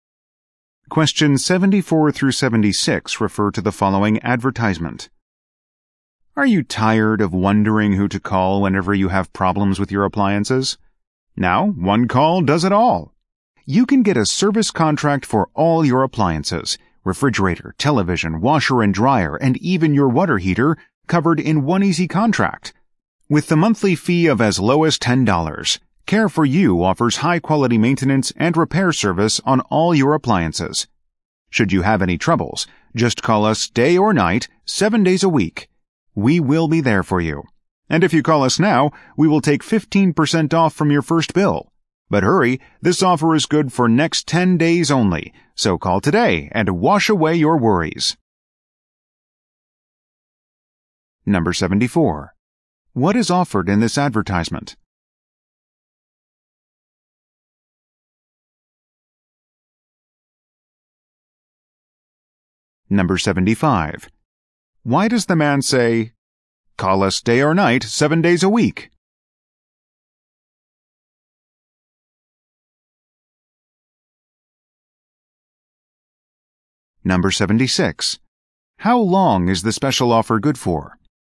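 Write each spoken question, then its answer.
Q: What is offered in this advertisement?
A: An appliance service contract

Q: Why does the man say, "Call us day or night, 7 days a week"?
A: To show the service is always available

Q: How long is the special offer good for?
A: 10 days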